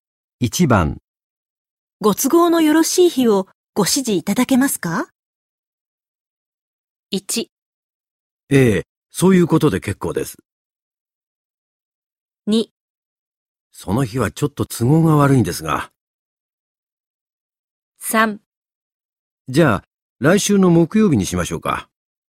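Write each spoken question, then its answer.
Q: ご都合のよろしい日をご指示いただけますか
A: 3: じゃあ、来週の木曜日にしましょうか。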